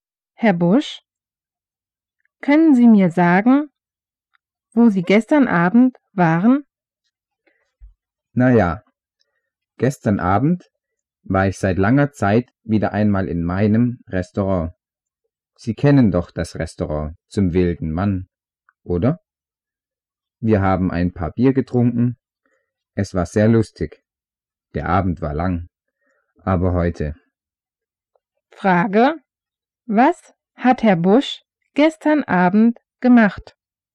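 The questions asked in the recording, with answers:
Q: Was hat Herr Busch gestern Abend gemacht?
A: Er war in seinem Restaurant und hat Bier getrunken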